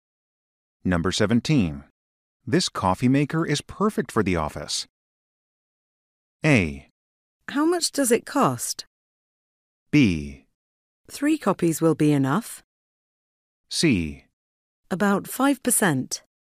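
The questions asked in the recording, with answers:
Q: This coffee maker is perfect for the office.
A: A: How much does it cost?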